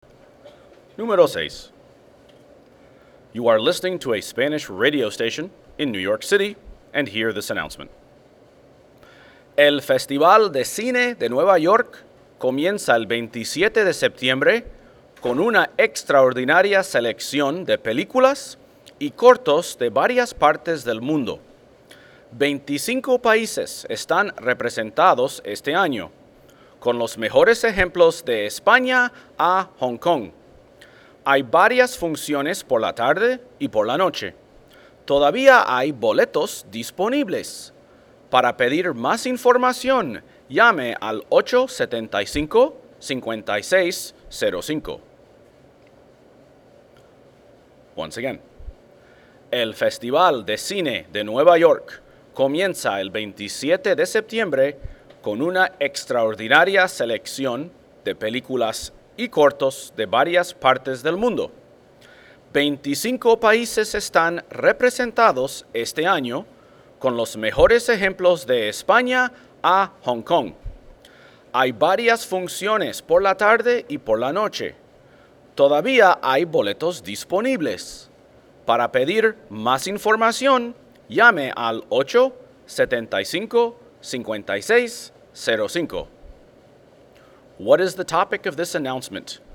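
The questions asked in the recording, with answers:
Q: What is the topic of this announcement?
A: The New York Film Festival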